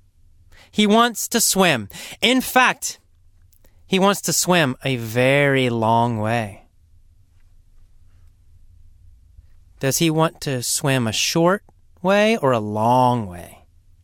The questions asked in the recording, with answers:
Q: Does he want to swim a short way or a long way?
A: A long way. He wants to swim a very long way.